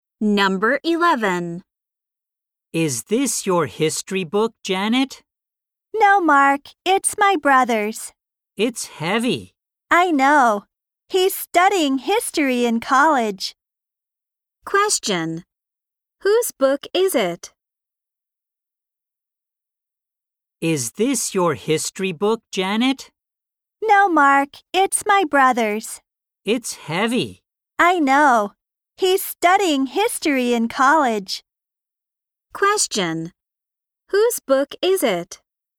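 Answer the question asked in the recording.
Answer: Janet's brother's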